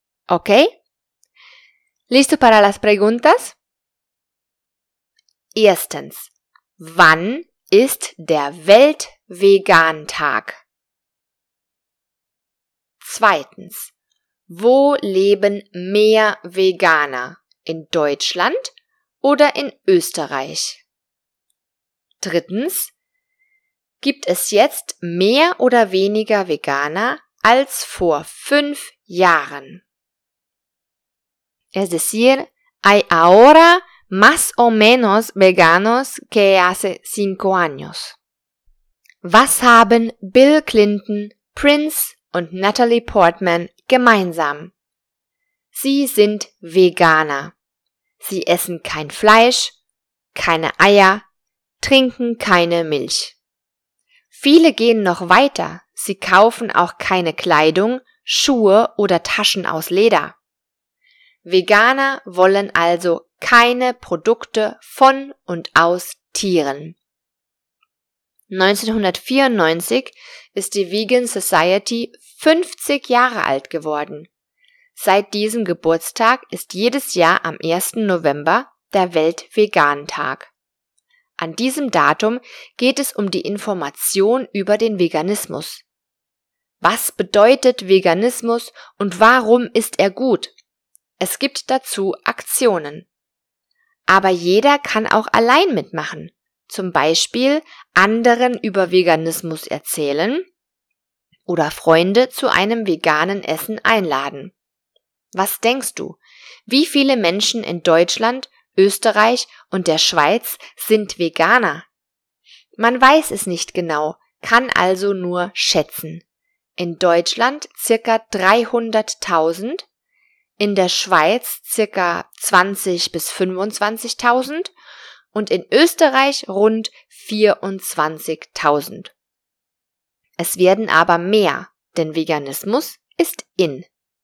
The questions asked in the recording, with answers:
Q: ¿wann ist der Weltvegantag?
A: Das ist der 1. November, also am 1.

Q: ¿wo leben mehr Veganer?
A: In Deutschland natürlich.

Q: ¿gibt es jetzt mehr oder weniger Veganer als vor 5 Jahren?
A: Es gibt mehr Veganer.